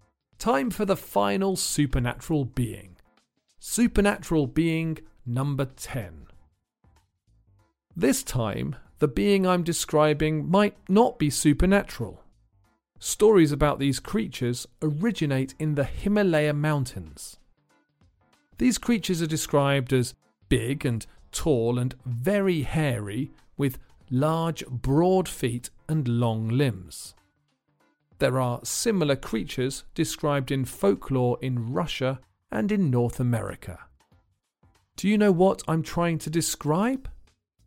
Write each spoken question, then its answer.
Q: Do you know what I'm trying to describe?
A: The answer is a Yeti, or abominable snowman.